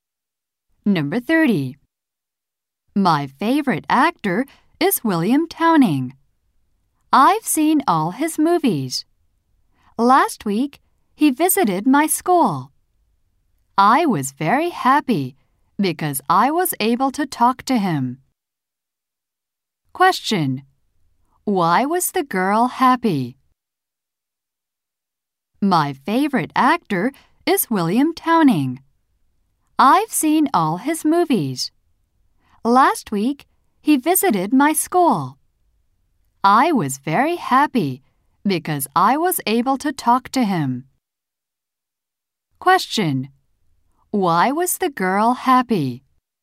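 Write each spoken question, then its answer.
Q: Why was the girl happy?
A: She was able to talk to her favorite actor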